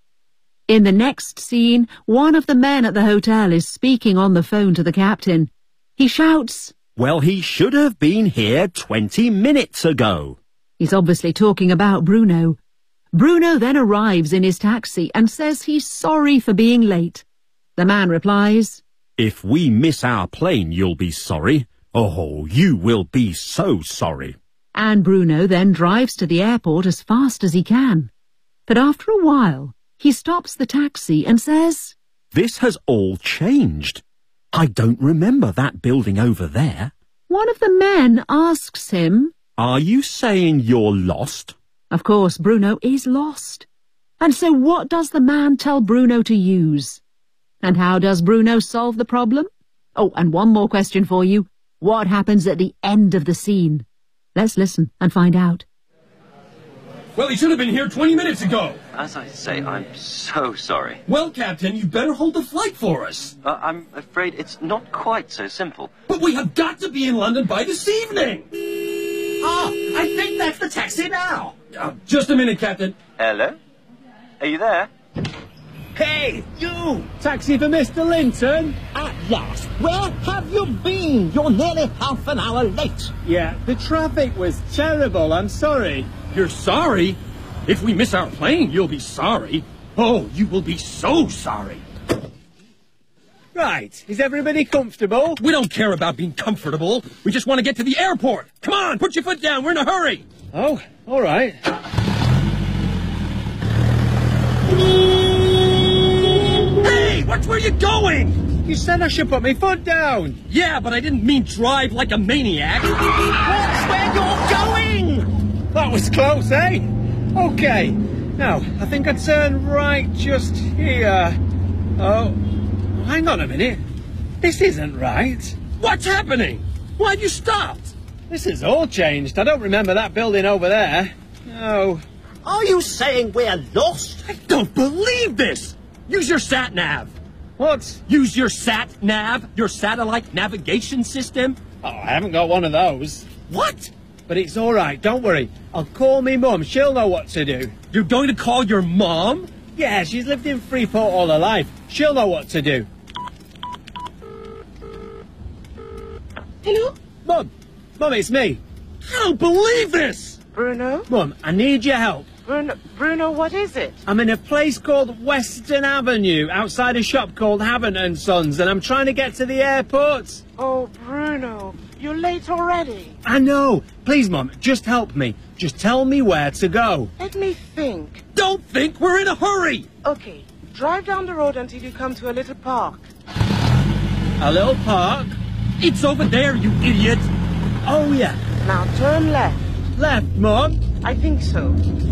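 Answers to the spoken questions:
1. His sat-nav (satellite navigation system)
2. He calls his mum for directions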